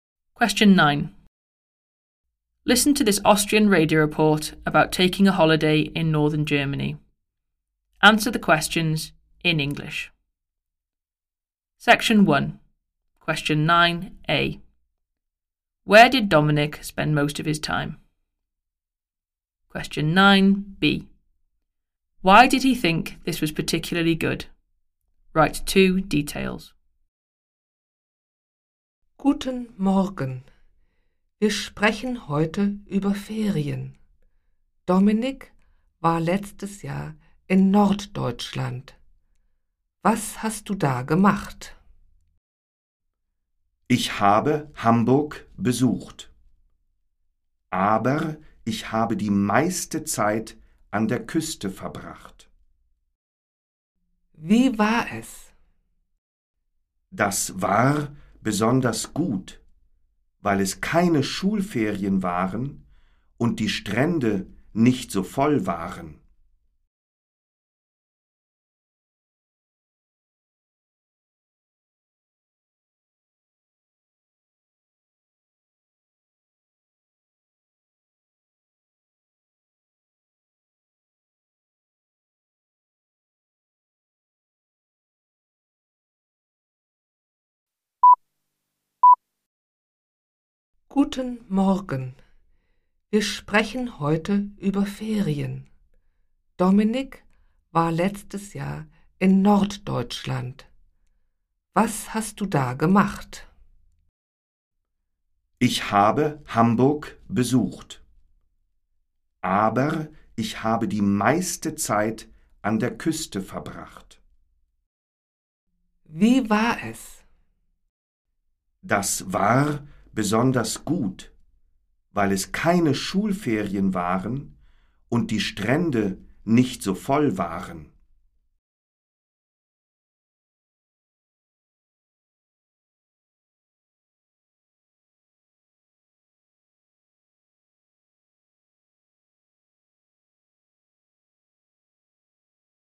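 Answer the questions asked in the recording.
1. On the coast
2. It wasn't school holidays and the beaches weren't so full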